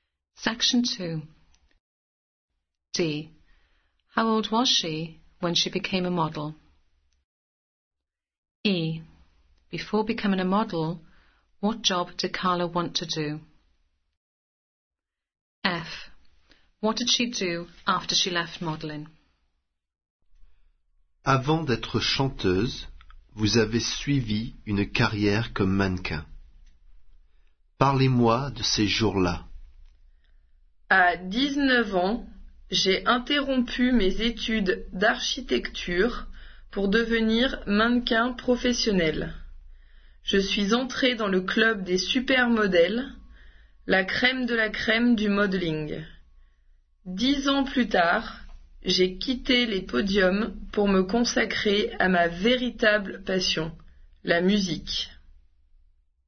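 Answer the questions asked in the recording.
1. 19
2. Architect
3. She devoted herself to music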